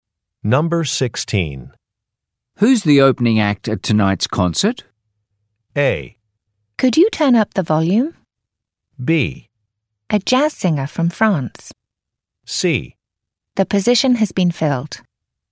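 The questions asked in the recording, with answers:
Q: Who's the opening act at tonight's concert?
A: B: A jazz singer from France.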